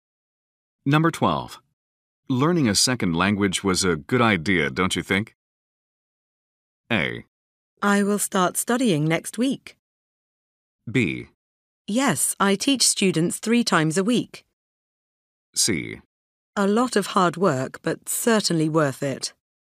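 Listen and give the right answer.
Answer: C: A lot of hard work, but certainly worth it.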